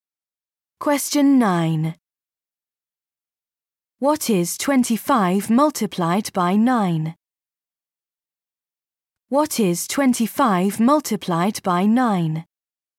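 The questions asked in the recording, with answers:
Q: What is 25 multiplied by 9?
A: 225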